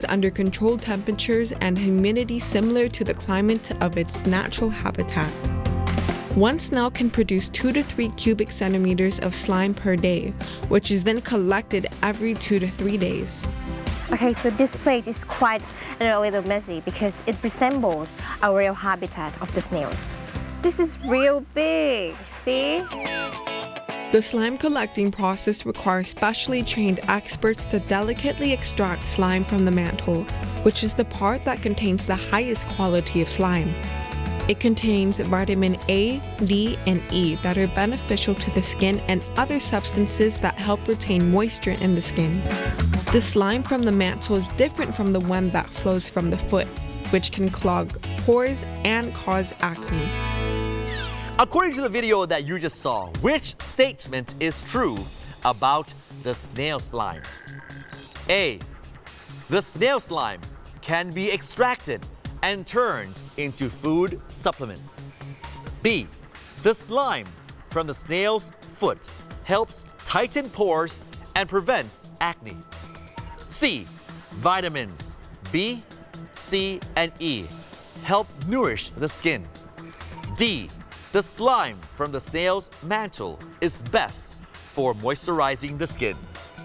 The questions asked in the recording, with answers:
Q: According to the video that you just saw, which statement is true about the snail slime?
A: D. The slime from the snail mantle is best for moisturizing the skin.